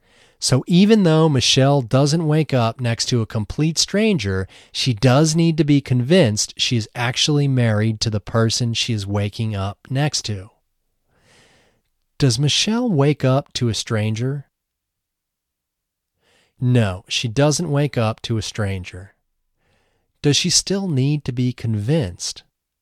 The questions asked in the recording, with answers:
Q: Does she still need to be convinced?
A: Yes, she still needs to be convinced she is actually married to the person she is waking up next to.